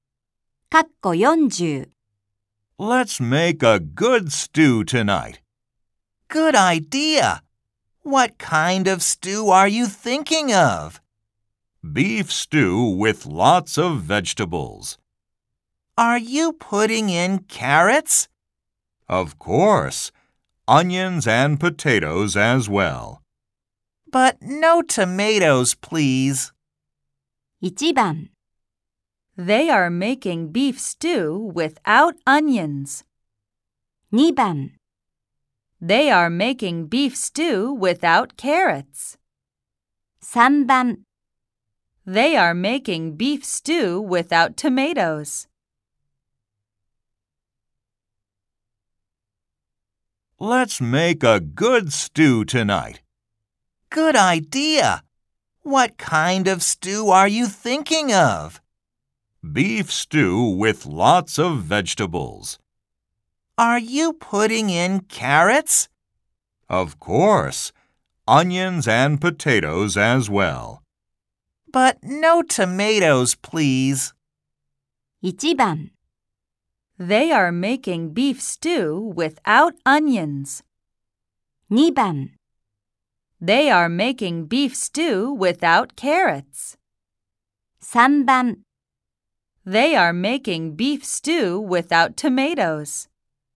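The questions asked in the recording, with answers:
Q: 1番 They are making beef stew without onions. 2番 They are making beef stew without carrots. 3番 They are making beef stew without tomatoes.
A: 3: They are making beef stew without tomatoes.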